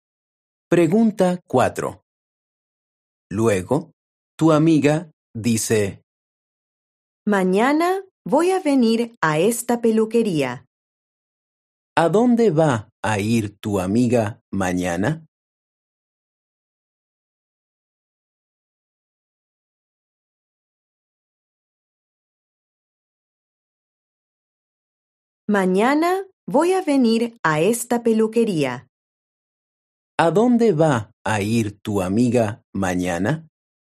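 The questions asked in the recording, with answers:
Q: ¿A dónde va a ir tu amiga mañana?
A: a la peluquería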